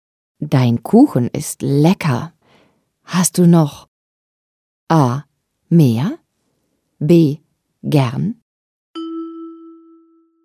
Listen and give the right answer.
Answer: A ist richtig. Hast du noch mehr?